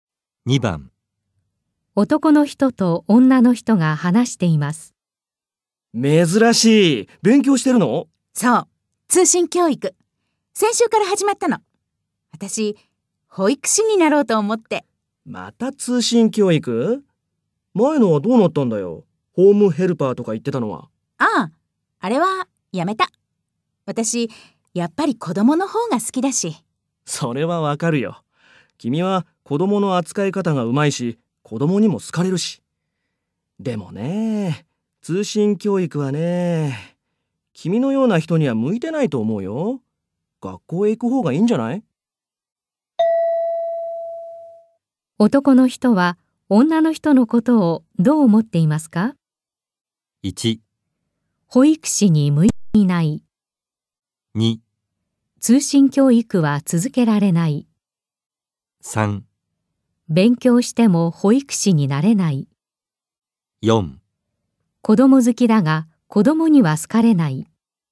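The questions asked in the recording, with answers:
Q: 男の人は女の人のことをどう思っていますか?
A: 2: 通信教育は続けられない。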